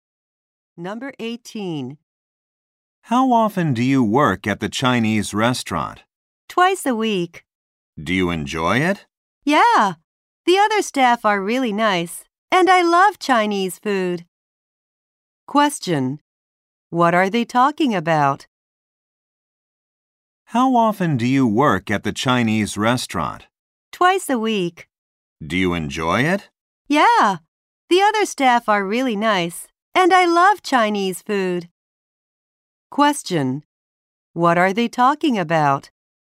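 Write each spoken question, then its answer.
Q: What are they talking about?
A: A part-time job at a Chinese restaurant.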